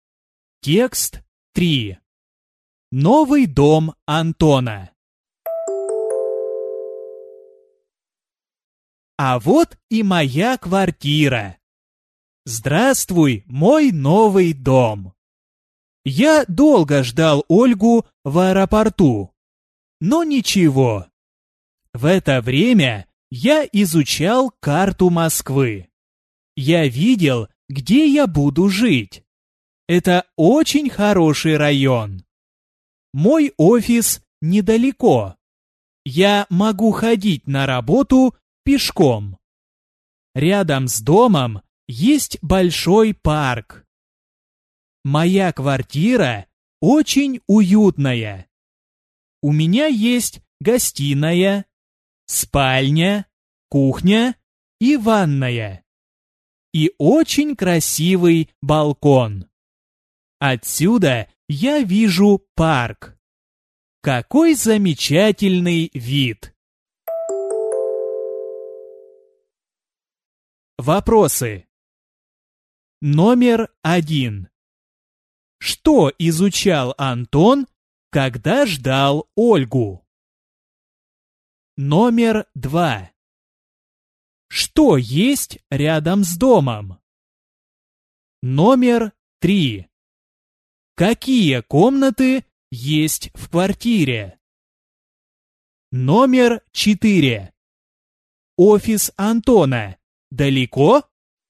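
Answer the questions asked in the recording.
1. Карту Москвы
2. Большой парк
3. Гостиная, спальня, кухня и ванная
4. Нет, недалеко, он может ходить пешком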